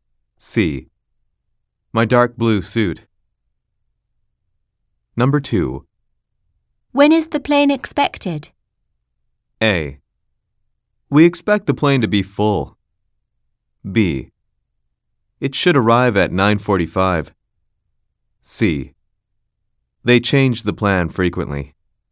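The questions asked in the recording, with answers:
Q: When is the plane expected?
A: B: It should arrive at 9:45.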